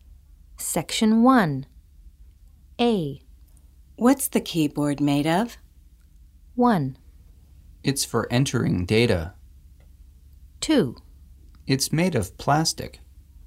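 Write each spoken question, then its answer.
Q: What's the keyboard made of?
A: 2: It's made of plastic.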